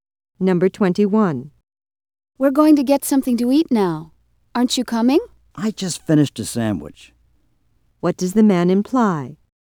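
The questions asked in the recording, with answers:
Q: What does the man imply?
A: He isn't hungry, so he won't go with them.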